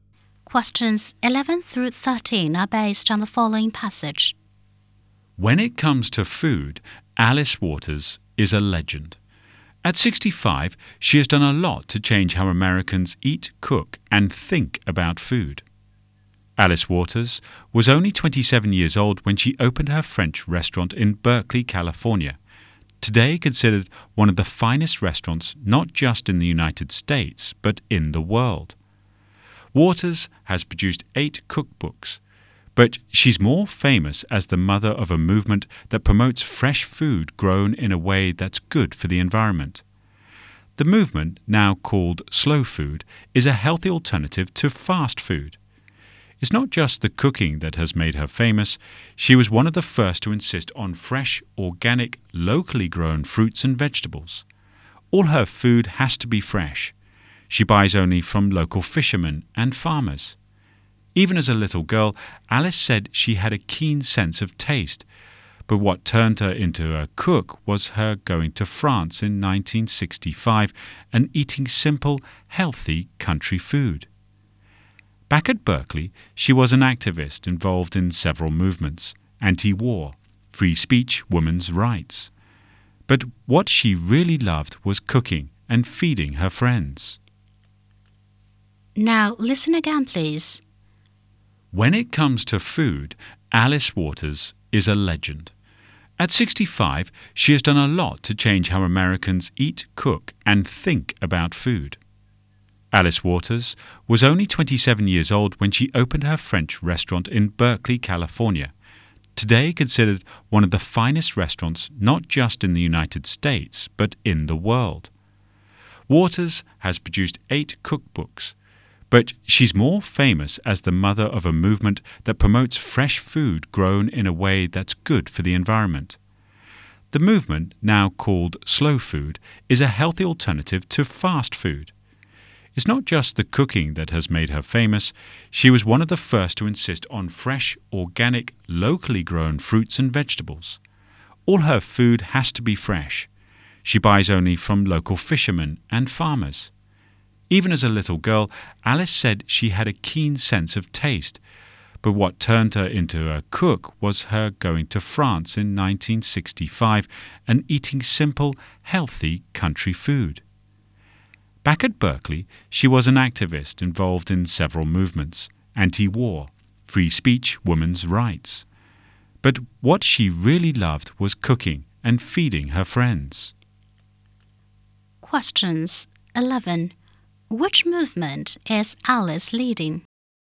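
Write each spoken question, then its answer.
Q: Which movement is Alice leading?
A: The slow food movement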